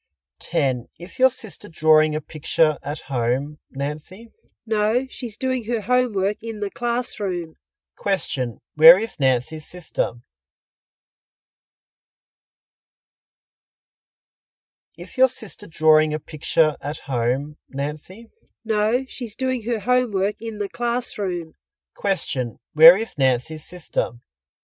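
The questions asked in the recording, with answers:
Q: Question. Where is Nancy's sister?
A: In the classroom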